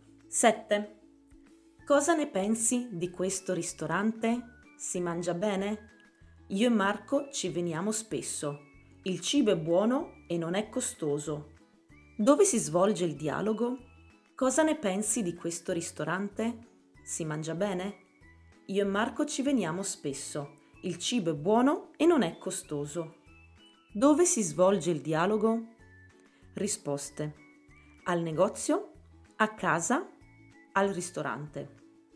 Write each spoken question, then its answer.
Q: Dove si svolge il dialogo?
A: Al ristorante, certo.